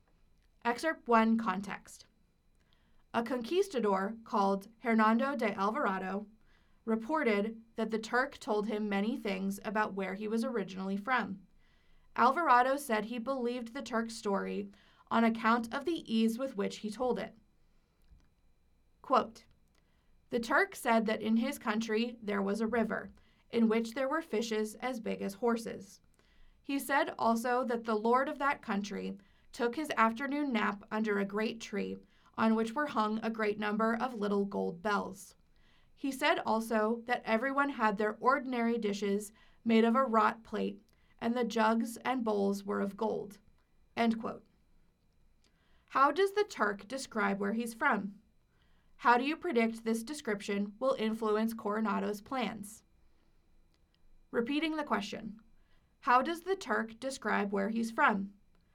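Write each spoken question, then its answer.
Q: How does the Turk describe where he's from?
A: As very rich: fish as big as horses, a lord napping under a tree hung with gold bells, and dishes and jugs of gold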